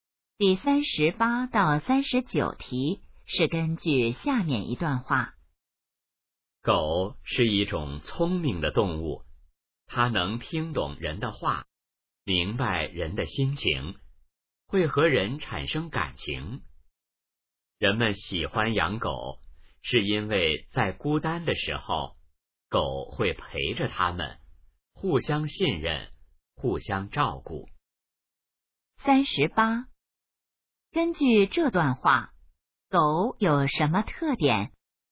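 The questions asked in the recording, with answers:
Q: 根据这段话,狗有什么特点?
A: 聪明,能听懂人的话

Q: 人们为什么喜欢狗?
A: 孤单时狗会陪着他们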